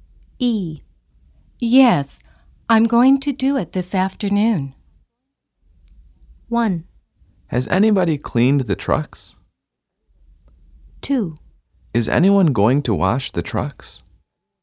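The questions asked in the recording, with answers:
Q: Yes, I'm going to do it this afternoon.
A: 2: Is anyone going to wash the trucks?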